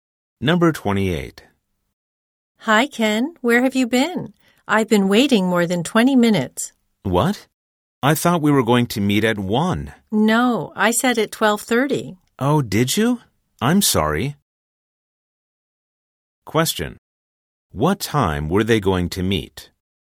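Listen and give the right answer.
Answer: At 12:30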